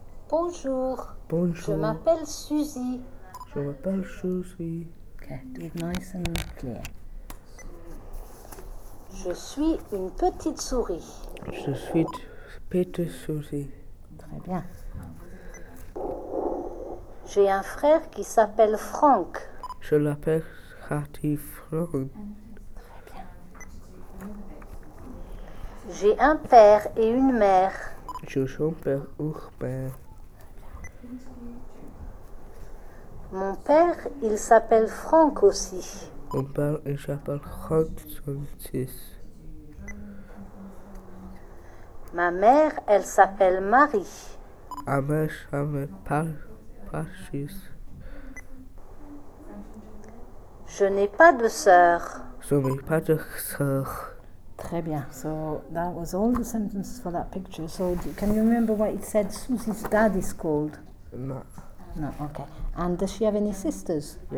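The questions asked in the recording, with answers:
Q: And does she have any sisters?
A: No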